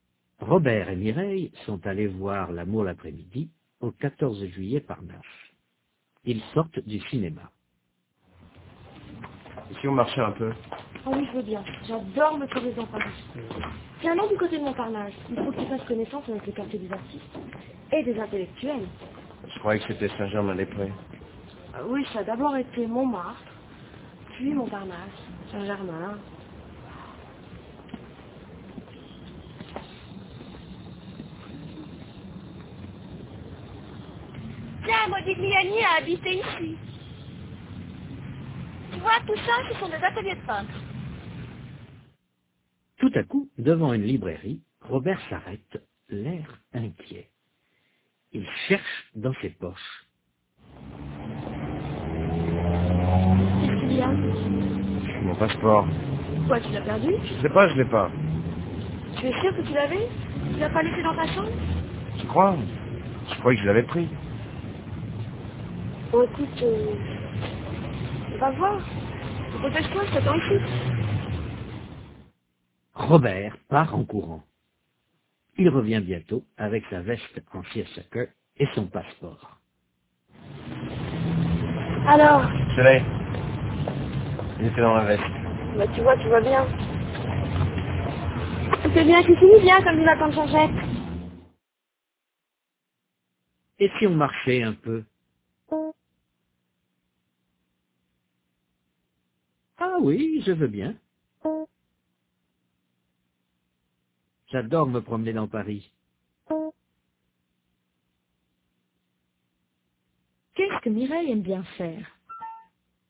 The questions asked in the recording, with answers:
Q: Qu'est-ce que Mireille aime bien faire?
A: Se promener dans Paris.